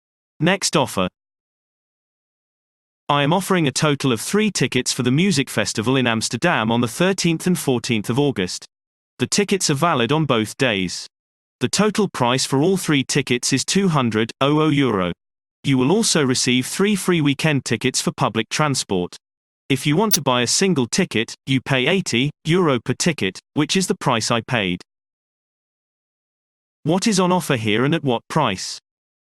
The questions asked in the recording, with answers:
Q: What is on offer here and at what price?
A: Response. 3 tickets for the music festival in Amsterdam for €200.